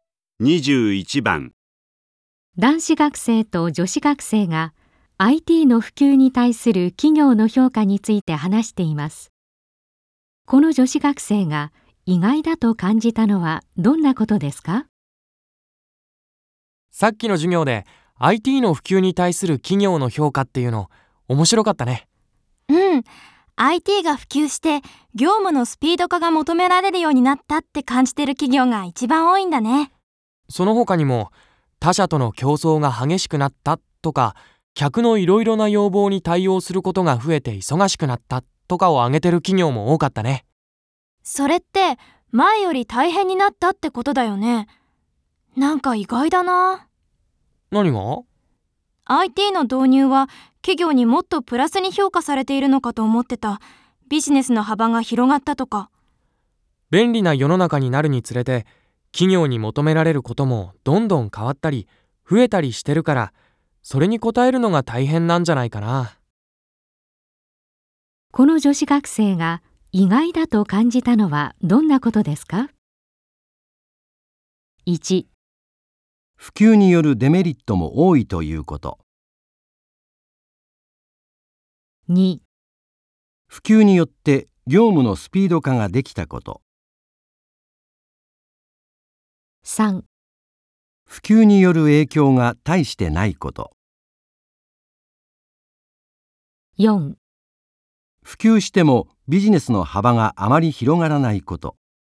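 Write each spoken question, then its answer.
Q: この女子学生が意外だと感じたのはどんなことですか?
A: 1: 普及によるデメリットも多いということ。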